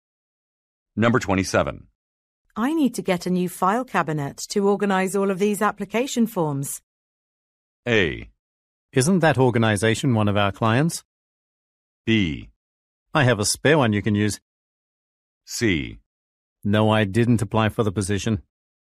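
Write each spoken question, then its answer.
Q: I need to get a new file cabinet to organize all of these application forms.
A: B: I have a spare one you can use.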